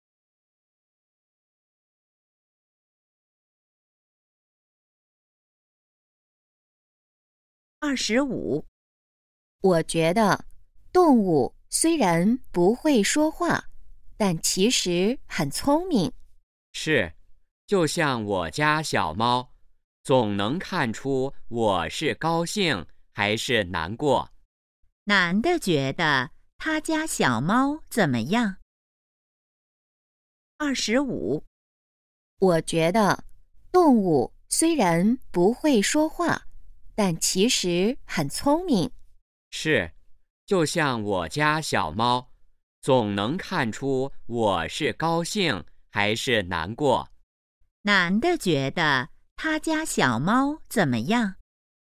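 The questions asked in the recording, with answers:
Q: 男的觉得他家小猫怎么样?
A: 很聪明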